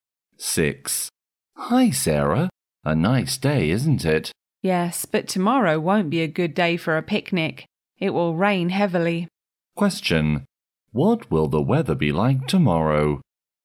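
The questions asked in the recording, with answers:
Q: What will the weather be like tomorrow?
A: It will rain heavily.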